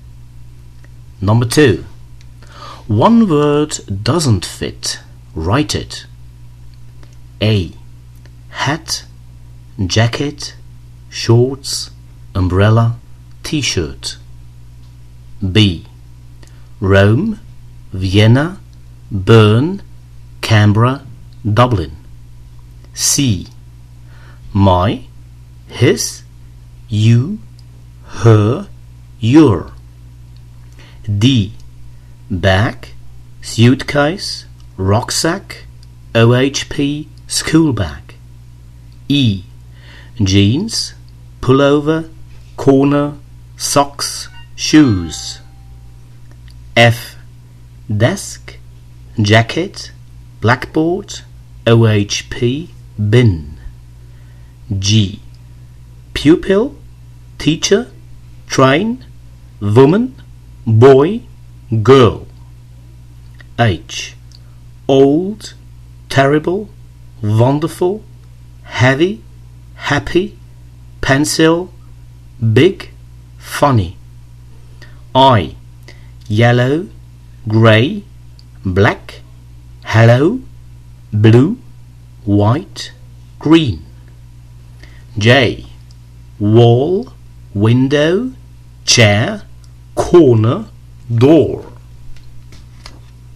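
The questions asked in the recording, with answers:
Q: C. My, his, you, her, your.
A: you

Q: D. Bag, suitcase, rucksack, OHP, school bag.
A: OHP

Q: E. Jeans, pullover, corner, socks, shoes.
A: corner

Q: F. Desk, jacket, blackboard, OHP, bin.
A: jacket

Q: G. Pupil, teacher, train, woman, boy, girl.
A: train

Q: H. Old, terrible, wonderful, heavy, happy, pencil, big, funny.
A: pencil

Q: I. Yellow, grey, black, hello, blue, white, green.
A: hello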